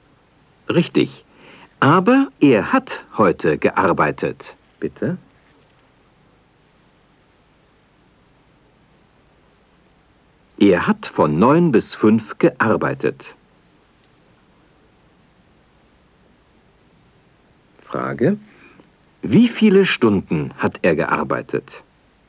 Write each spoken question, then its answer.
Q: Wie viele Stunden hat er gearbeitet?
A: Er hat 8 Stunden gearbeitet.